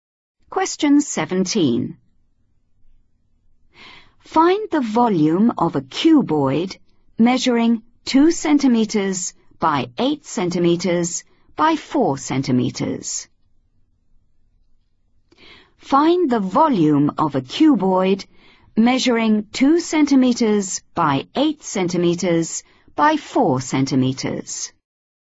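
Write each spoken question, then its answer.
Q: Find the volume of a cuboid measuring 2 centimeters by 8 centimeters by 4 centimeters.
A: 64 cm3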